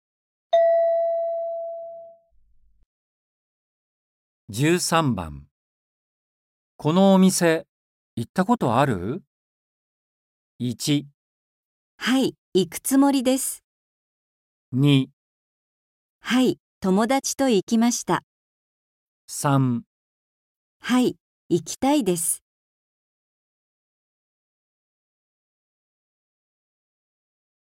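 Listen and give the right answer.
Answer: はい、友だちと行きました。

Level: N4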